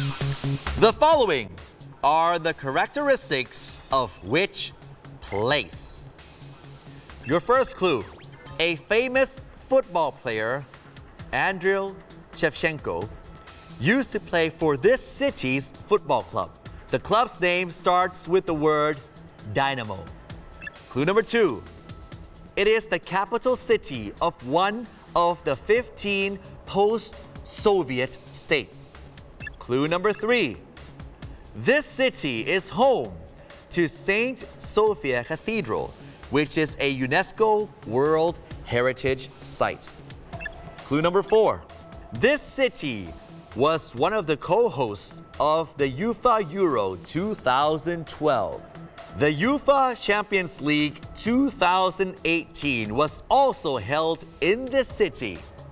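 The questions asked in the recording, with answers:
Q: The following are the characteristics of which place.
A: Kiev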